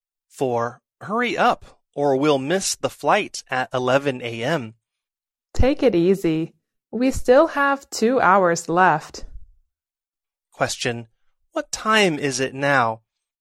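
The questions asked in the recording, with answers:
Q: What time is it now?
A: 9 a.m.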